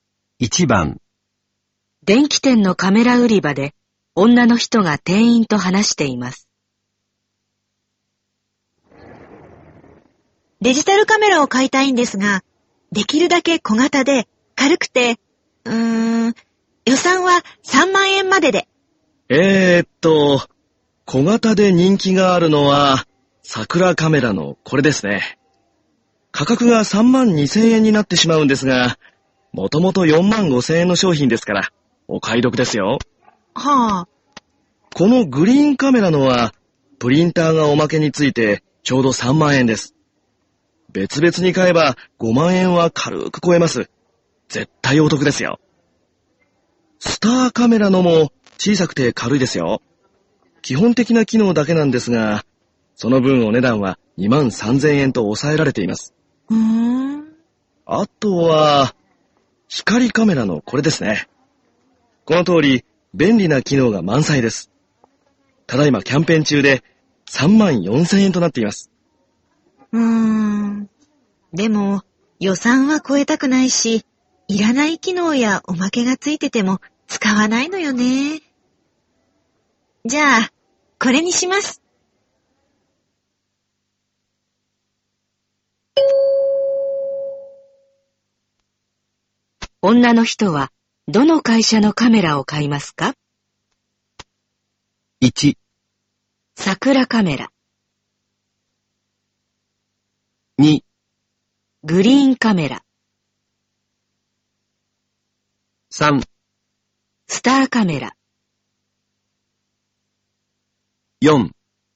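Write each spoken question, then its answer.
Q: 女の人は、どの会社のカメラを買いますか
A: 3: スターカメラ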